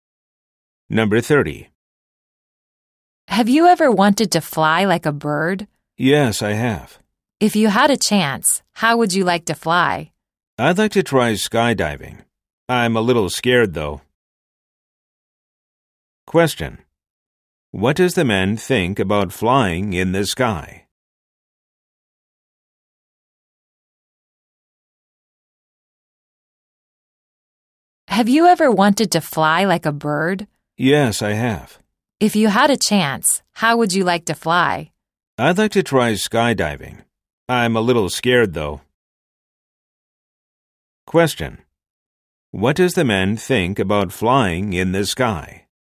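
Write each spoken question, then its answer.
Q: What does the man think about flying in the sky?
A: He'd like to try skydiving but is a little scared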